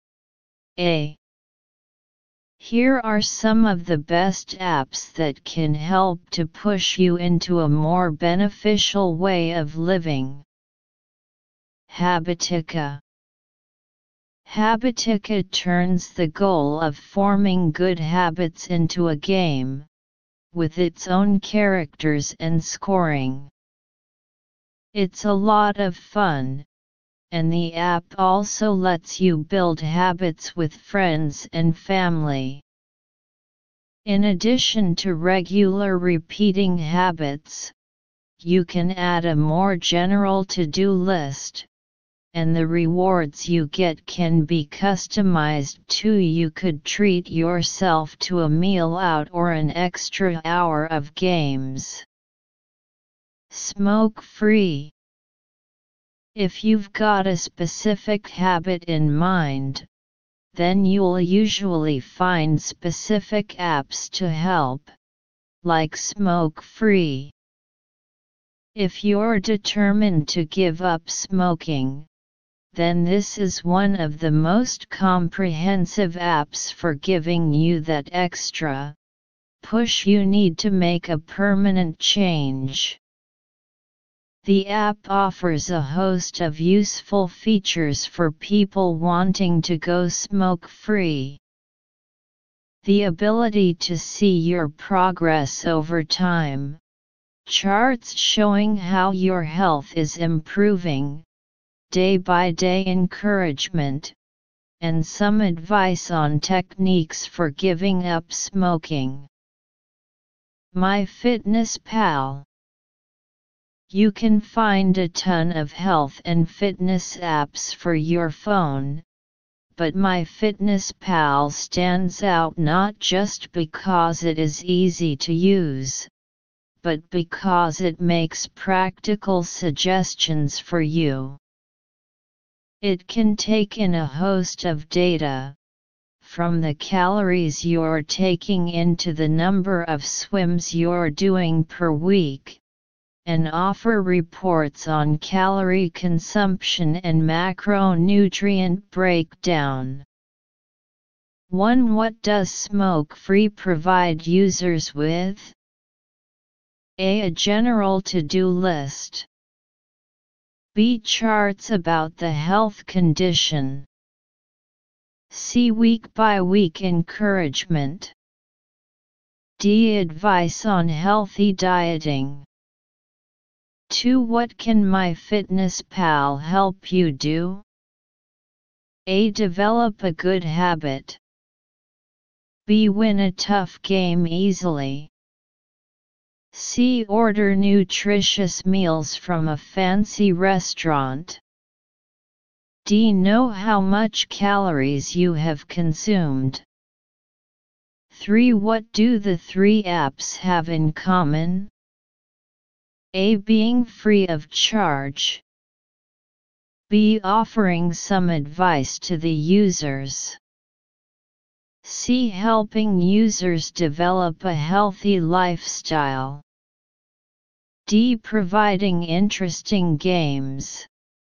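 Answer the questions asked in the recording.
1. B: Charts about the health condition.
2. D: Know how much calories you have consumed.
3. C: Helping users develop a healthy lifestyle.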